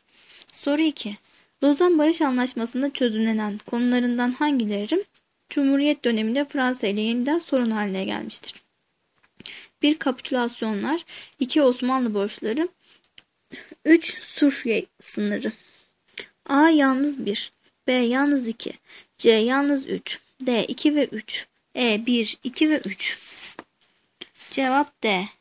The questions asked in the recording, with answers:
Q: Lozan Barış Anlaşması'nda çözümlenen konularından hangileri Cumhuriyet döneminde Fransa ile yeniden sorun haline gelmiştir?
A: Cevap D.